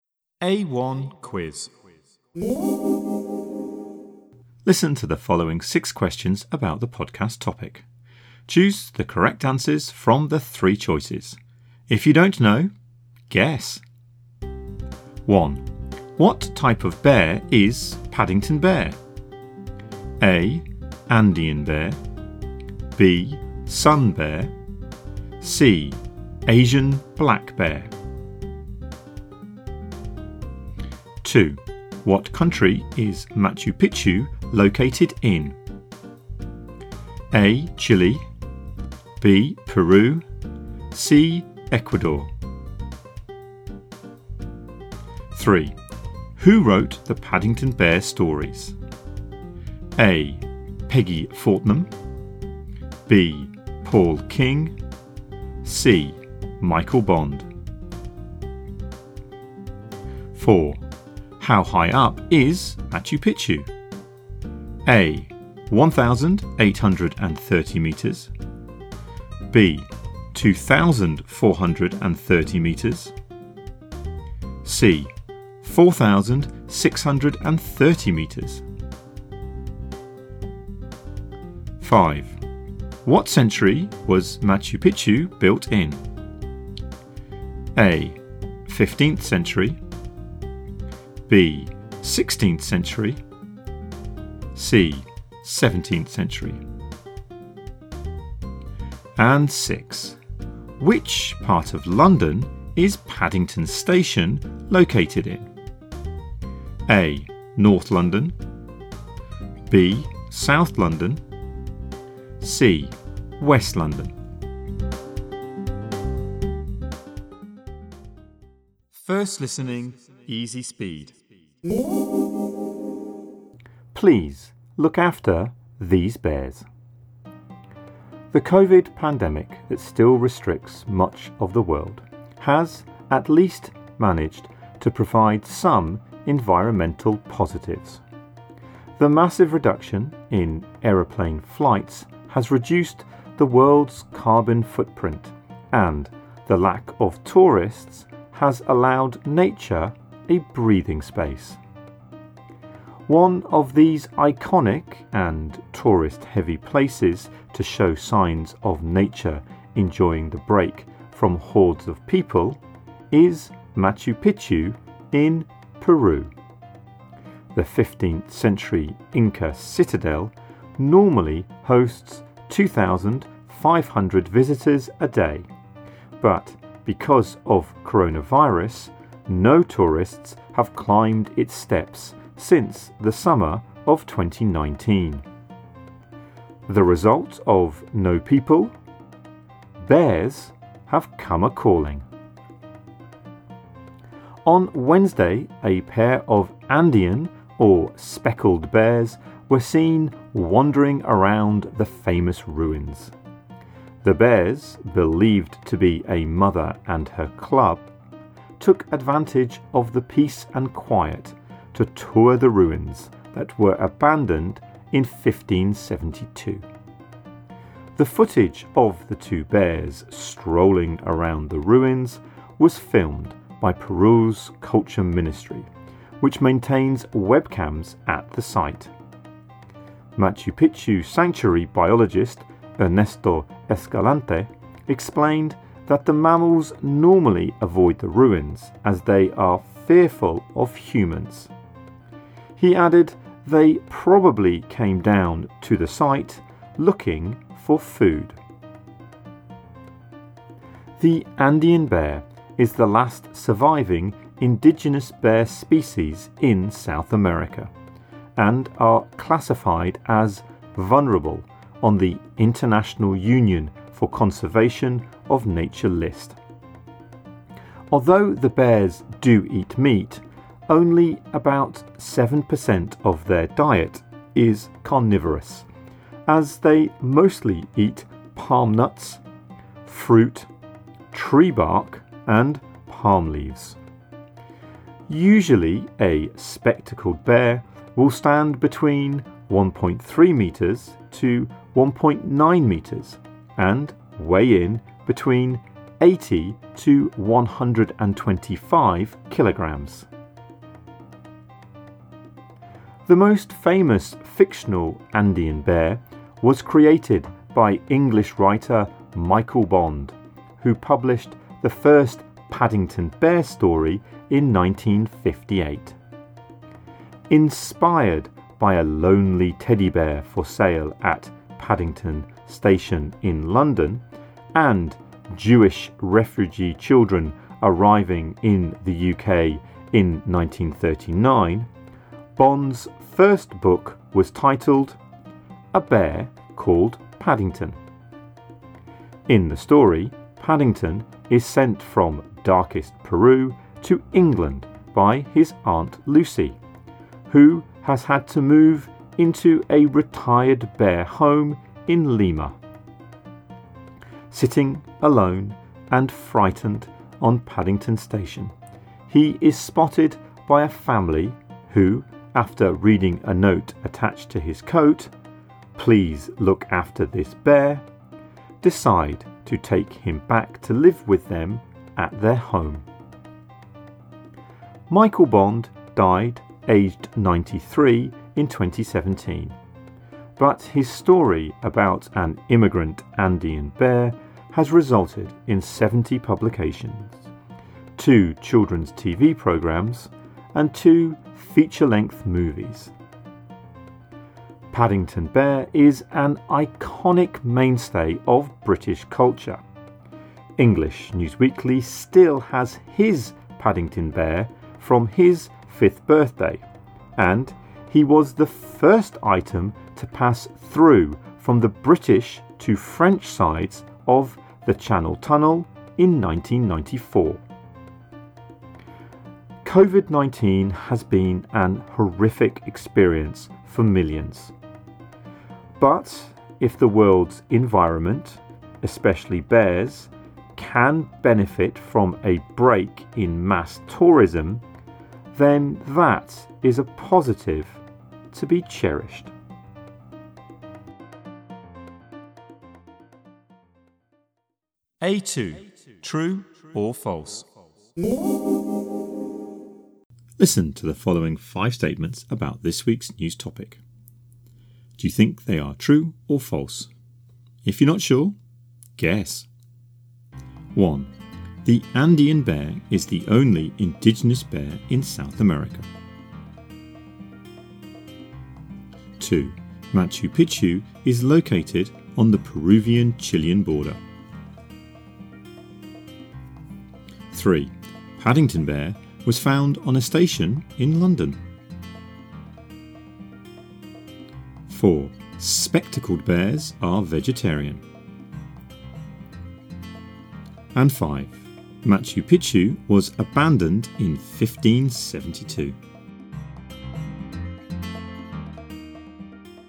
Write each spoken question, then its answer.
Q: What type of bear is Paddington Bear?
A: A. Andean Bear.

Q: What country is Machu Picchu located in?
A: B. Peru.

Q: Who wrote the Paddington Bear stories?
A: C. Michael Bond.

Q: What century was Machu Picchu built in?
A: A. 15th century.

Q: The Andean bear is the only indigenous bear in South America.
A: True.

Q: Machu Picchu is located on the Peruvian-Chilean border.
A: False.

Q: Paddington Bear was found on a station in London.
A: True.

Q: Spectacled bears are vegetarian.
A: False.

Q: Machu Picchu was abandoned in 1572.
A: True.